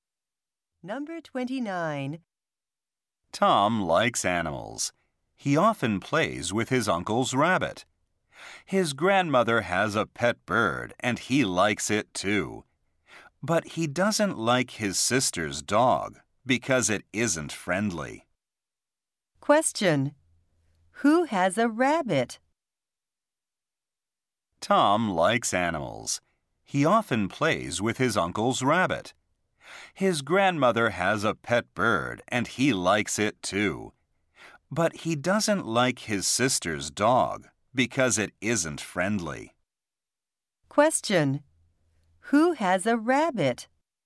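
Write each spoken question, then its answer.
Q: Who has a rabbit?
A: Tom's uncle.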